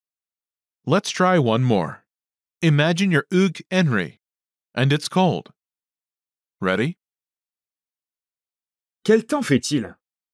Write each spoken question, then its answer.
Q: Quel temps fait-il?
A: Il fait froid.